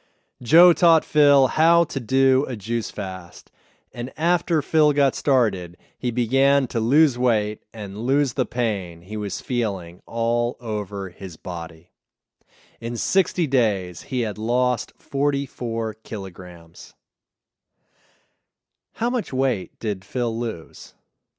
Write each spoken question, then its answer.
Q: How much weight did Phil lose?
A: Phil lost 44 kilograms.